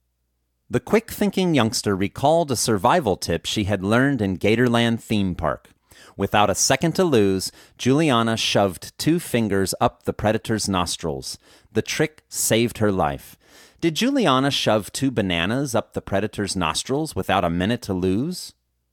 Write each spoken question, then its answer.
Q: Did Juliana shove 2 bananas up the predator's nostrils without a minute to lose?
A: No, Juliana didn't shove 2 bananas up the predator's nostrils without a minute to lose.